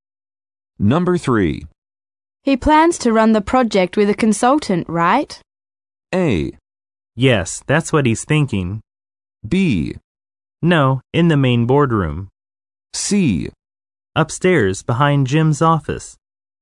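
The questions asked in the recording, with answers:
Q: He plans to run the project with a consultant, right?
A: A: Yes, that's what he's thinking.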